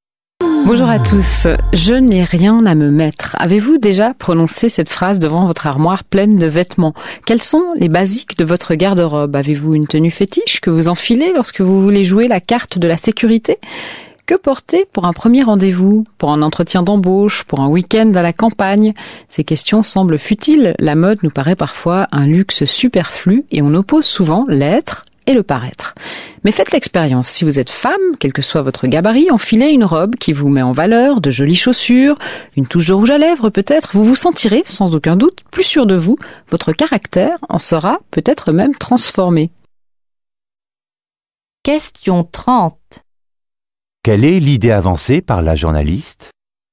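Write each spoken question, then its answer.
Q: Quelle est l'idée avancée par la journaliste ?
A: Les vêtements influencent la confiance en soi, voire le caractère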